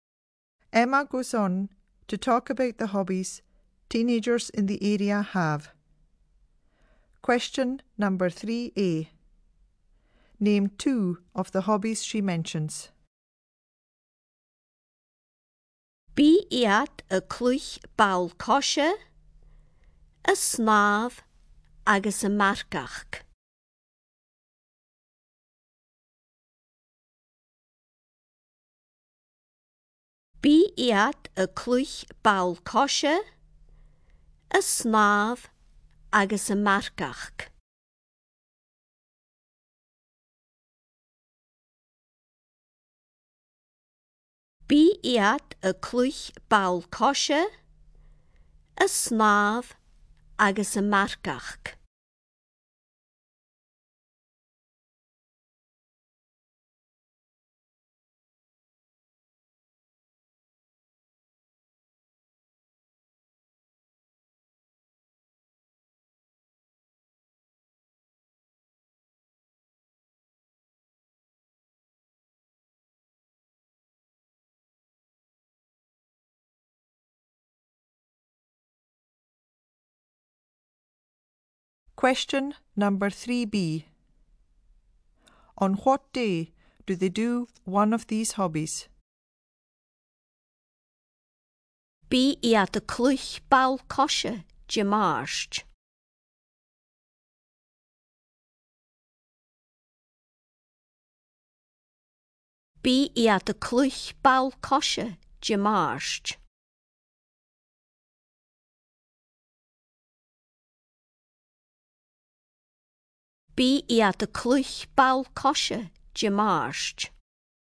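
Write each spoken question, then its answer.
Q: On what day do they do one of these hobbies?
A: Tuesday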